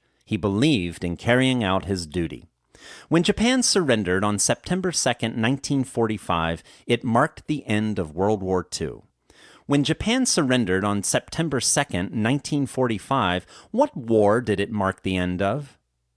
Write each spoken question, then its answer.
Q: When Japan surrendered on September 2, 1945, what war did it mark the end of?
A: When Japan surrendered on September 2, 1945, it marked the end of World War II.